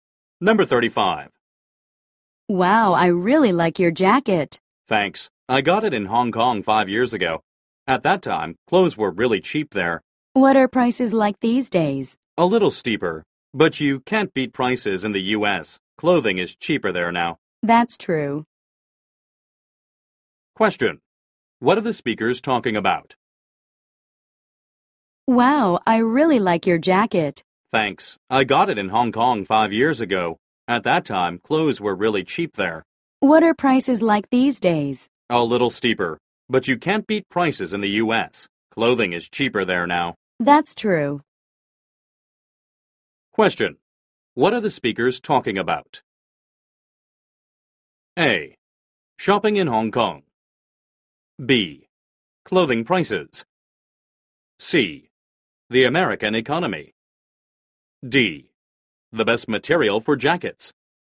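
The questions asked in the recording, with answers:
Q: What are the speakers talking about?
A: B: Clothing prices.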